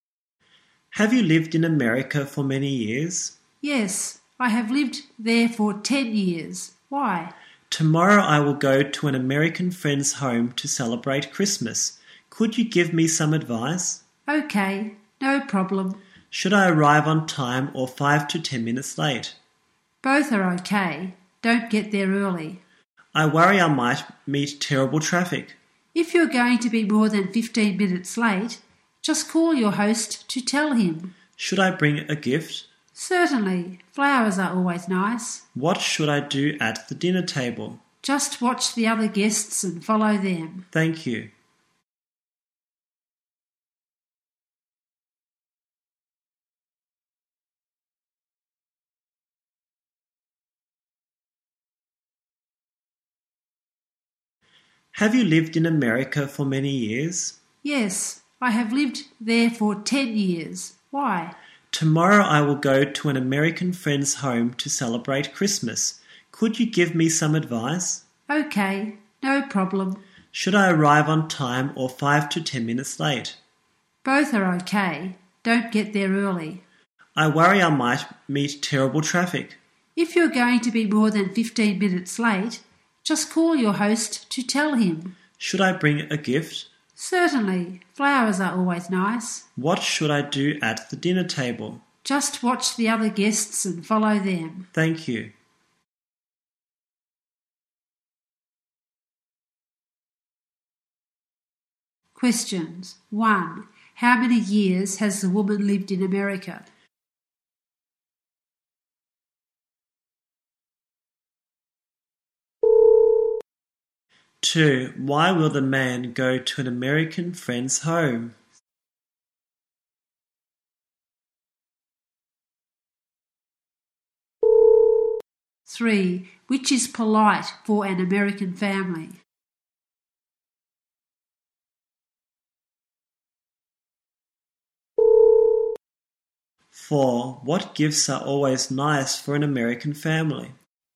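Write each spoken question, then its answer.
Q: How many years has the woman lived in America?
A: 10 years.

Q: Why will the man go to an American friend's home?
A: To celebrate Christmas.

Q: What gifts are always nice for an American family?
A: Flowers.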